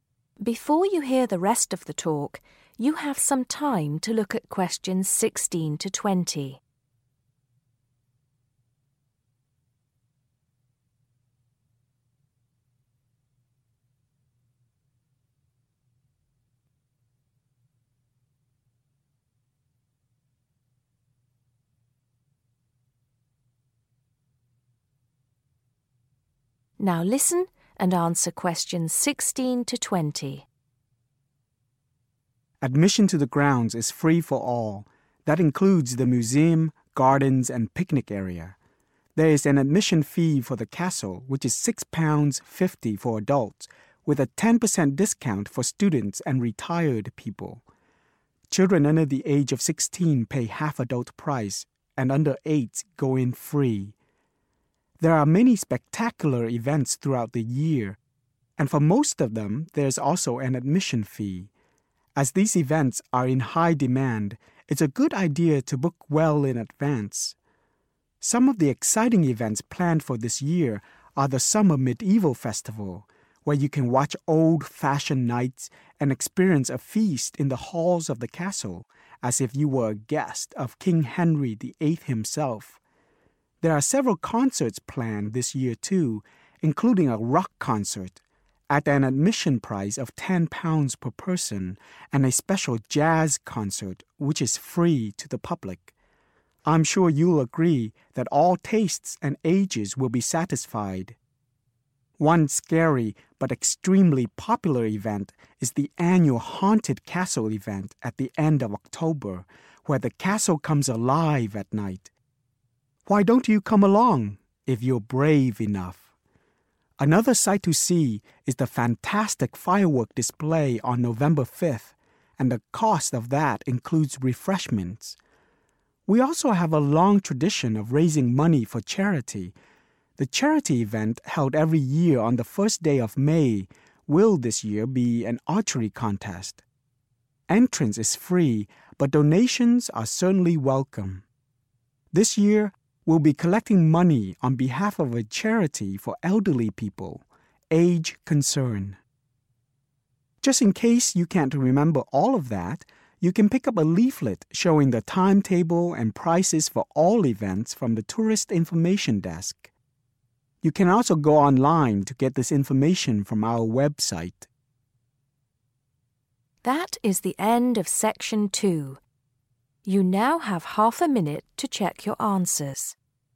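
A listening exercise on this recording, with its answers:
Which THREE activities or events do you need to pay to get in? Choose THREE letters A-F.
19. How often is the charity event held?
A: every year

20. Who does Age Concern help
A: elderly people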